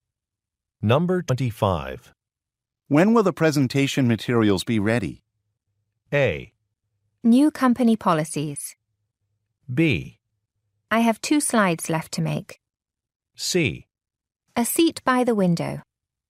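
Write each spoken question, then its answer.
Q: When will the presentation materials be ready?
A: B: I have 2 slides left to make.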